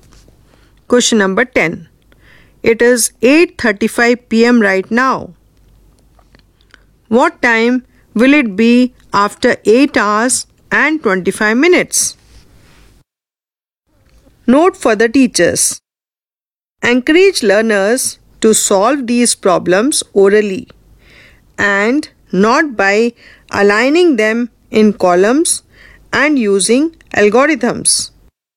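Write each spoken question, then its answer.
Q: What time will it be after 8 hours and 25 minutes?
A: 5:00 a.m.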